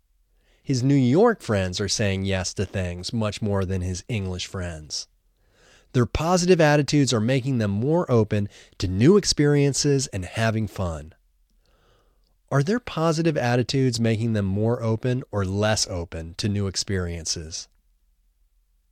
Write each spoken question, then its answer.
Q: Are their positive attitudes making them more open or less open to new experiences?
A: Their positive attitudes are making them more open to new experiences.